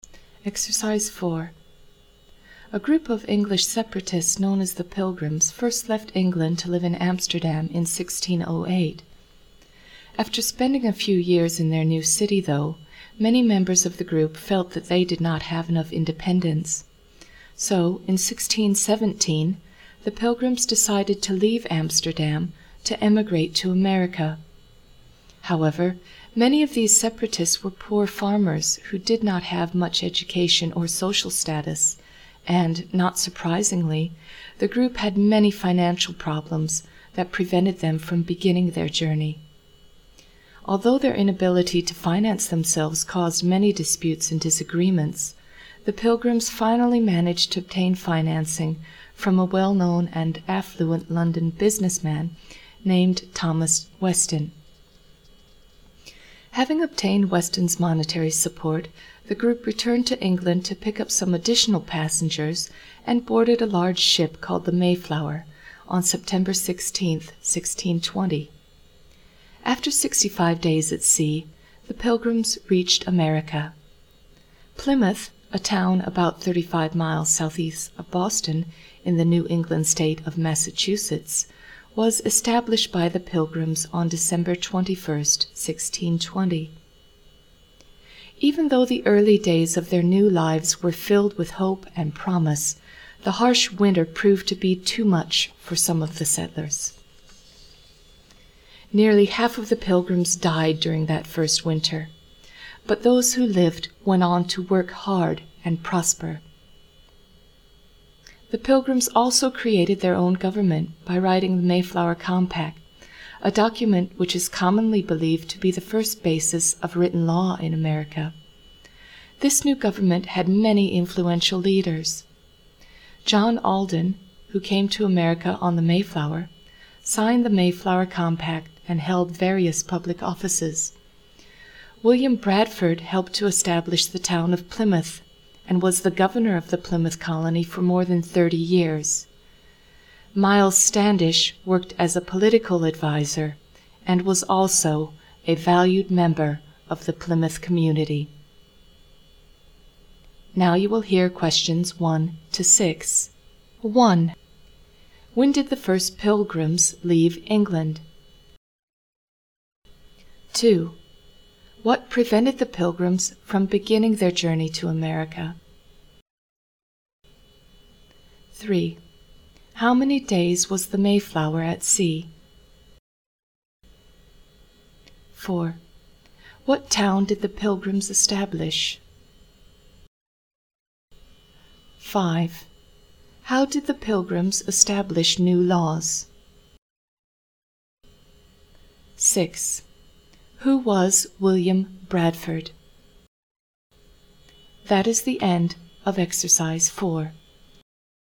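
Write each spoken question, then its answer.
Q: When did the first Pilgrims leave England?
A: In 1608

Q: What prevented the Pilgrims from beginning their journey to America?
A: Financial problems

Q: How many days was the Mayflower at sea?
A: 65 days

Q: What town did the Pilgrims establish?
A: Plymouth

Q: How did the Pilgrims establish new laws?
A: By writing the Mayflower Compact

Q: Who was William Bradford?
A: He helped establish Plymouth and was governor of the Plymouth colony for more than 30 years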